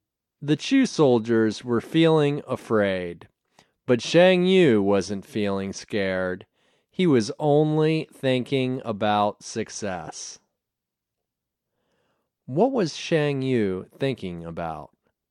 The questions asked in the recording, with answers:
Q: What was Shang Yu thinking about?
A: He was thinking about success.